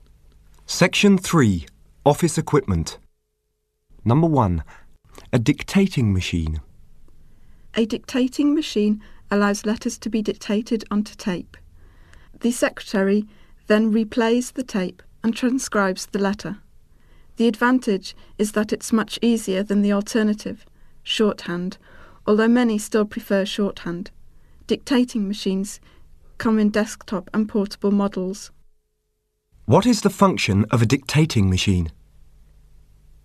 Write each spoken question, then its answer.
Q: What is the function of a dictating machine?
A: It is used to record dictations of letters which are then transcribed.